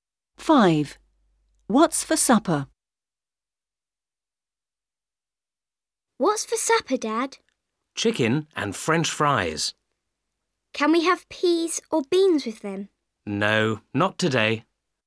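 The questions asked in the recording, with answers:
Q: What's for supper?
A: Chicken and French fries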